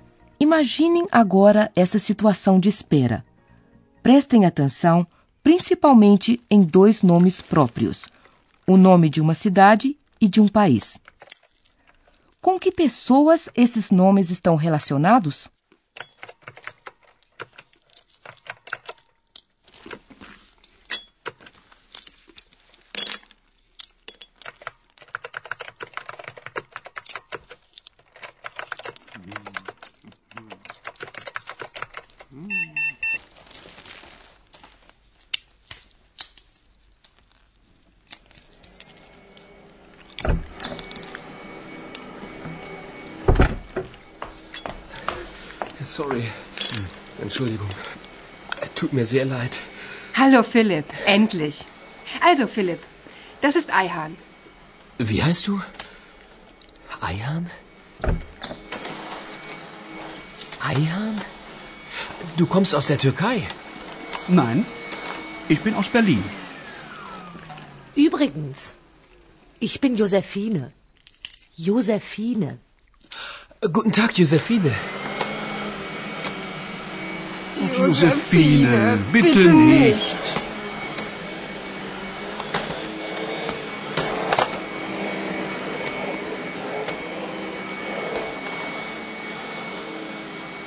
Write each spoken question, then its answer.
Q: Com que pessoas esses nomes estão relacionados?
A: Esse é o caso de Ayhan. Seus pais vieram realmente da Turquia, mas ele nasceu em Berlim.